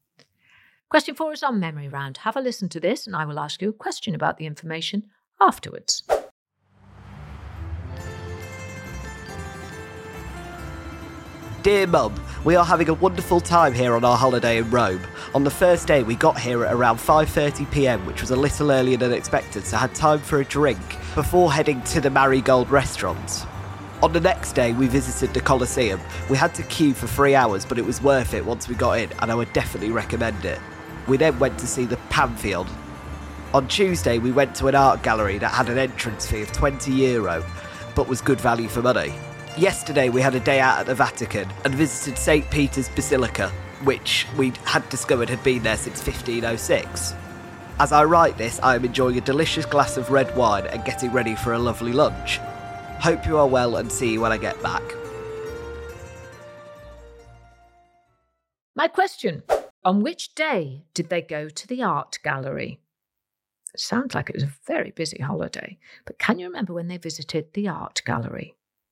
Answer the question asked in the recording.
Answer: And the answer was Tuesday.